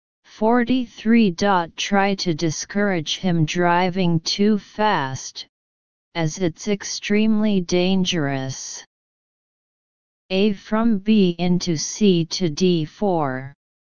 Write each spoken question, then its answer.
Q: Try to discourage him driving too fast, as it's extremely dangerous.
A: Answer A.